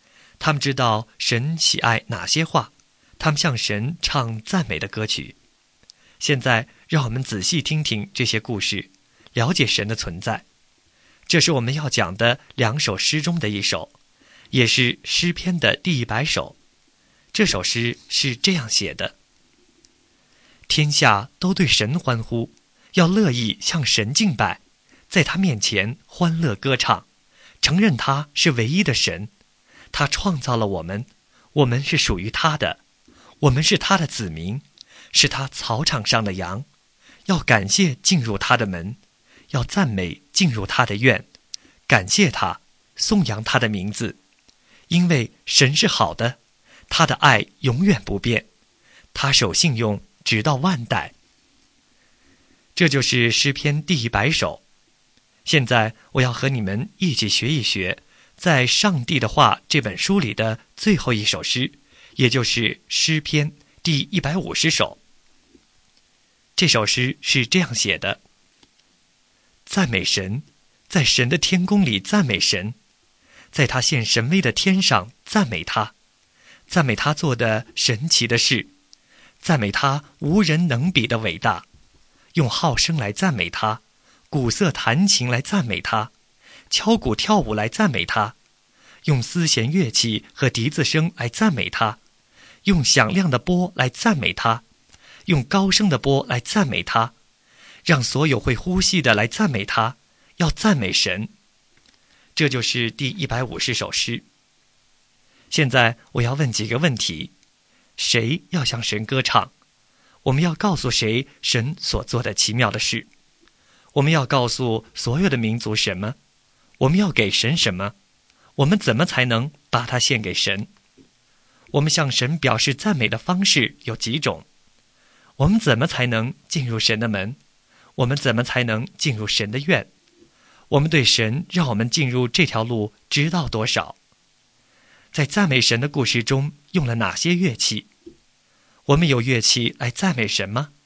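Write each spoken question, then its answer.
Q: 我们怎么才能进入神的门?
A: 要感谢进入他的门

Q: 我们怎么才能进入神的院?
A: 要赞美进入他的院

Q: 在赞美神的故事中用了哪些乐器?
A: 号、瑟、琴、鼓、丝弦乐器、笛子、钹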